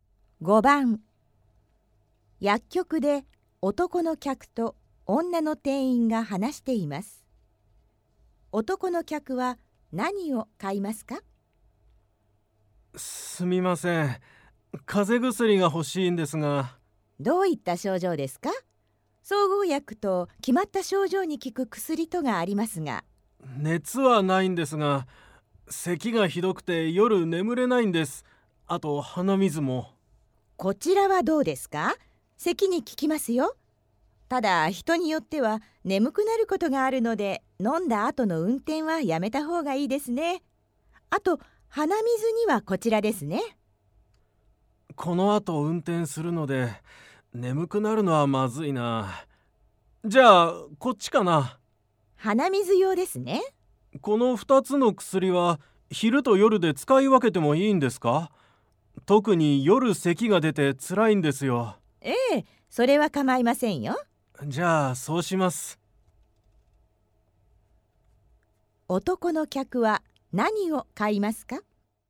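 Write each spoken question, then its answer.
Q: 男の客は何を買いますか?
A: 咳の薬と鼻水の薬の両方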